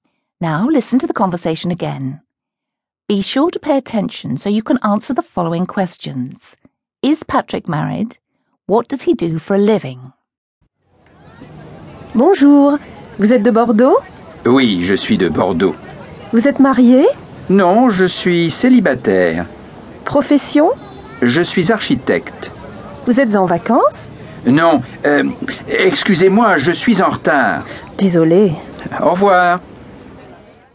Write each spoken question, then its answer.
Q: Is Patrick married?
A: Did you say no? If you did, you're right.

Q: What does he do for a living?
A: If you said he's an architect, you're right again.